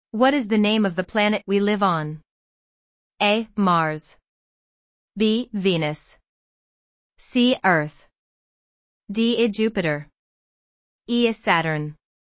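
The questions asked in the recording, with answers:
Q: What is the name of the planet we live on?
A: C: Earth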